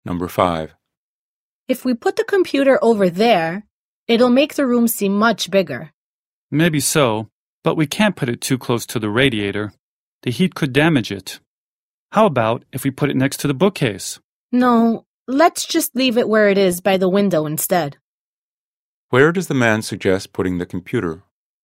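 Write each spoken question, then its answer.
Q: Where does the man suggest putting the computer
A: Where it is now, by the window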